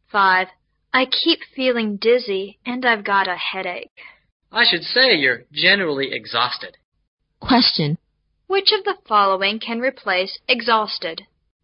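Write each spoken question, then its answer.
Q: Which of the following can replace exhausted?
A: Very tired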